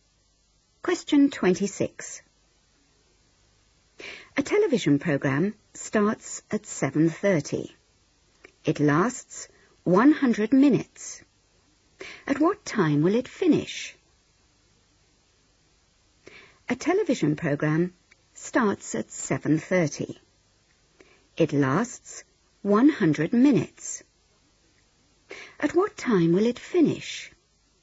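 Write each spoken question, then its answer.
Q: It lasts 100 minutes. At what time will it finish?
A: 9:10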